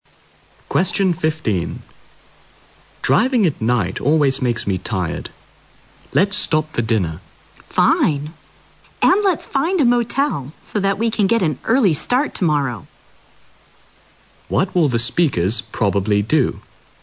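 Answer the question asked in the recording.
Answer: Stop for dinner and stay at a motel for the night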